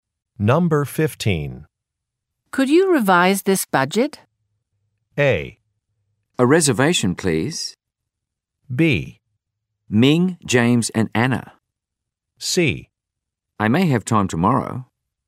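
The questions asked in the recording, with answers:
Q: Could you revise this budget?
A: C: I may have time tomorrow.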